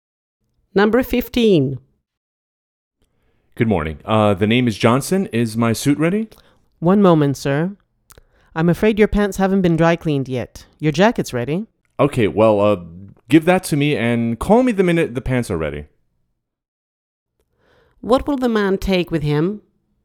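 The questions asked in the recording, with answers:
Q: What will the man take with him?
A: His jacket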